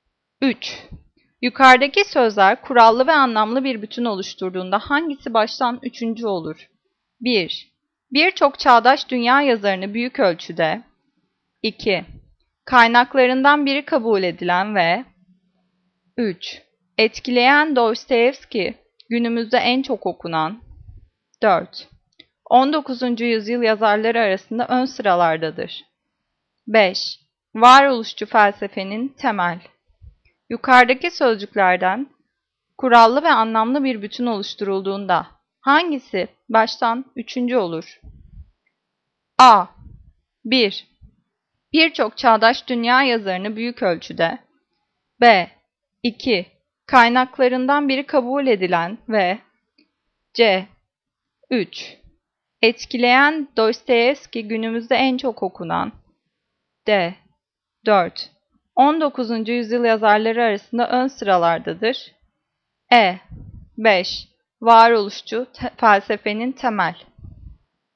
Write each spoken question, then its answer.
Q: Yukarıdaki sözler kurallı ve anlamlı bir bütün oluşturduğunda hangisi baştan üçüncü olur?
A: Cevap. A. 1. Birçok çağdaş dünya yazarını büyük ölçüde.